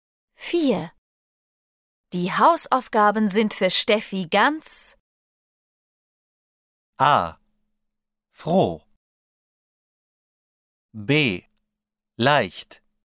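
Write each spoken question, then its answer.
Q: Die Hausaufgaben sind für Steffi ganz... A. Froh. B. Leicht.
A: B: Leicht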